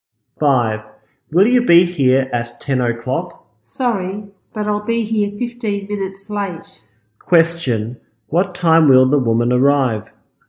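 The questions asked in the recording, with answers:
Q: Question, what time will the woman arrive?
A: At 10:15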